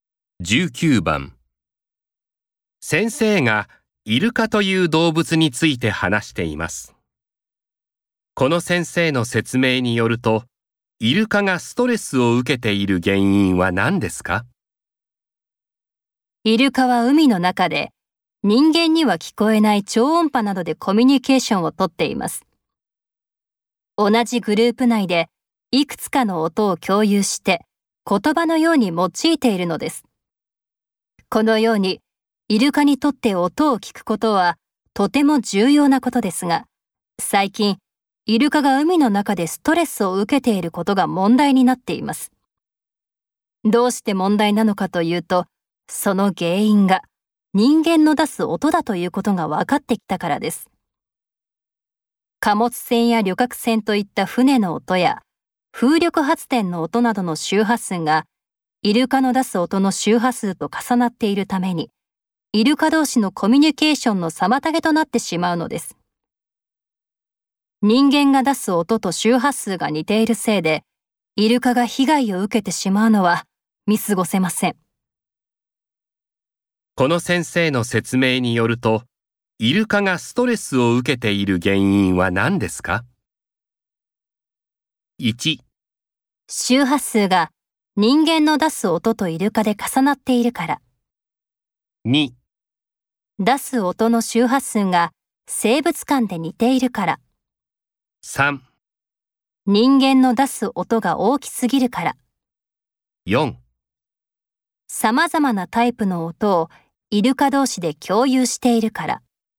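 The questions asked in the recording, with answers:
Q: この先生の説明によると、イルカがストレスを受けている原因は何ですか?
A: 1: 周波数が人間の出す音とイルカで重なっているから。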